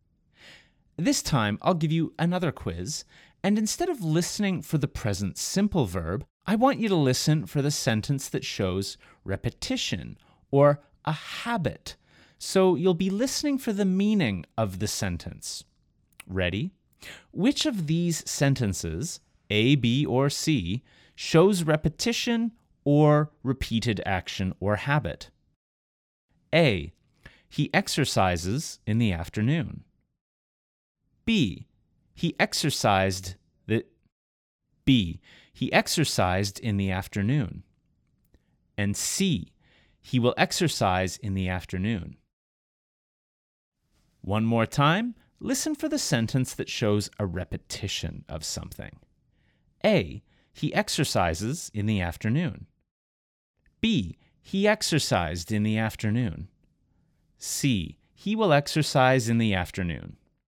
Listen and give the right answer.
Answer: The answer here is A. He exercises in the afternoon.